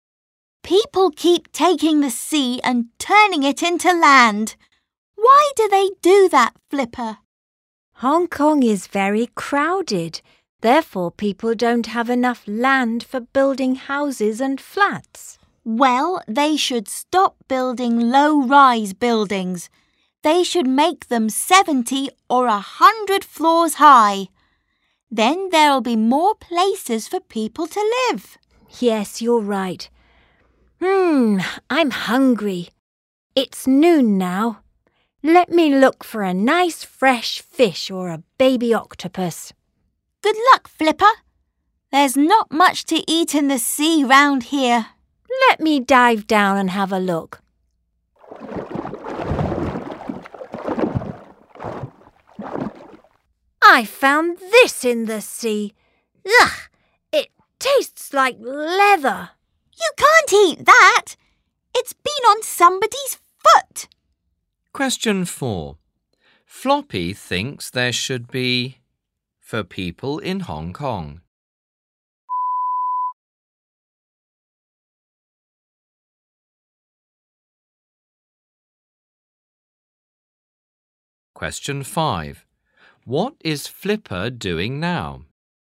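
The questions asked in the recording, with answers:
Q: What is Flipper doing now?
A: Diving down to look for food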